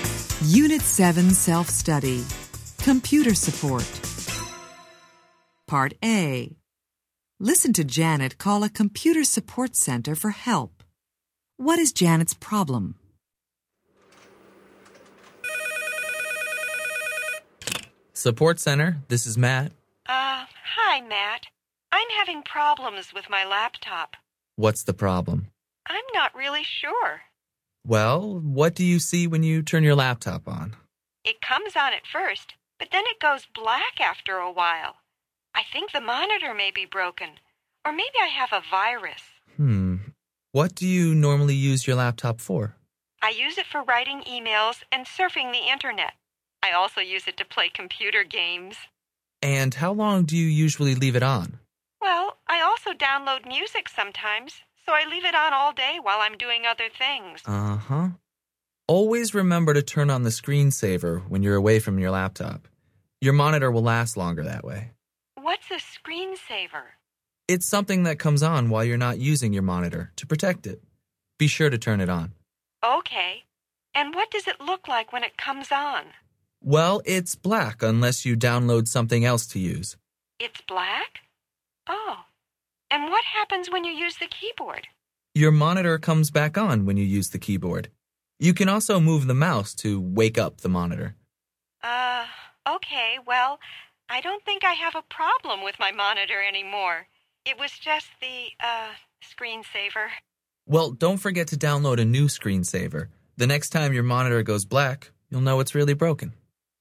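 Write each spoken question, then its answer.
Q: What is Janet's problem?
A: Her laptop screen goes black after a while, but it was only the screensaver.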